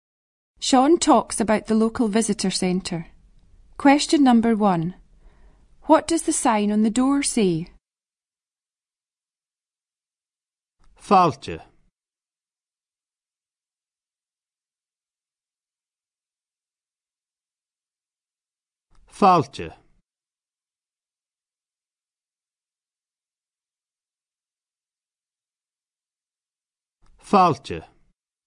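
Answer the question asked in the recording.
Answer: Welcome (Fàilte)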